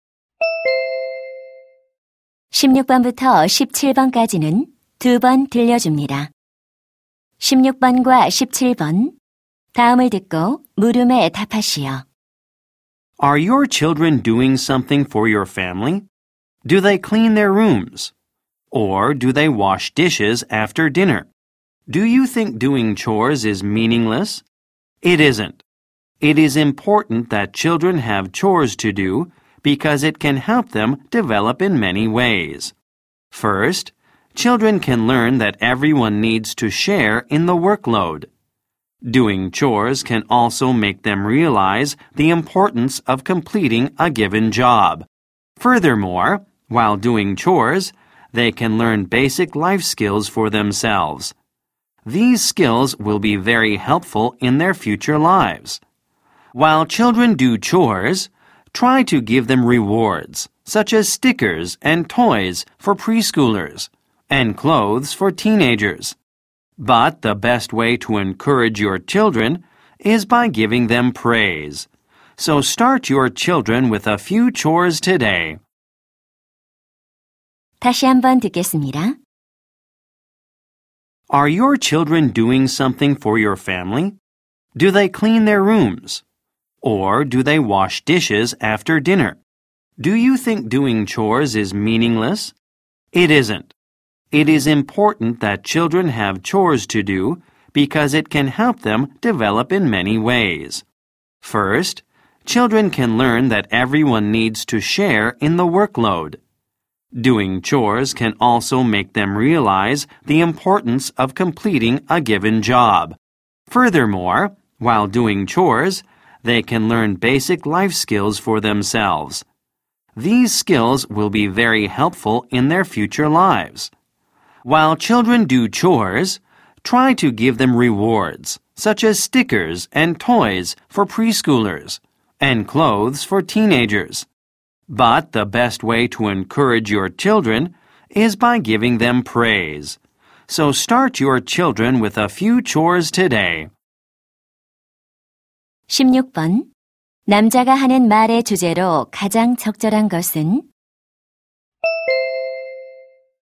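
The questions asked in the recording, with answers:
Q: 16번 남자가 하는 말의 주제로 가장 적절한 것은?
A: 아이들에게 집안일을 시키는 것의 중요성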